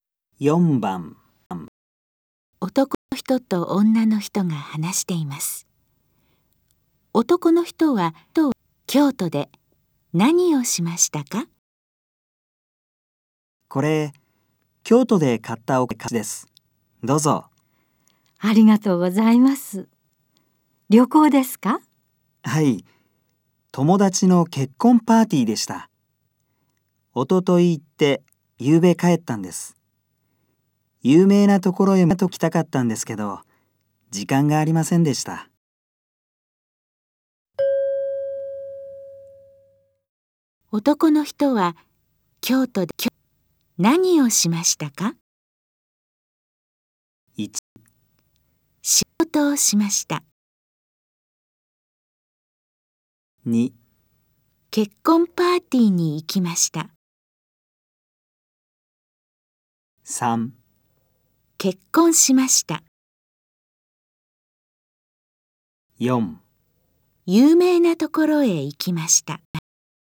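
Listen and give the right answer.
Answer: 2: 結婚パーティーに行きました。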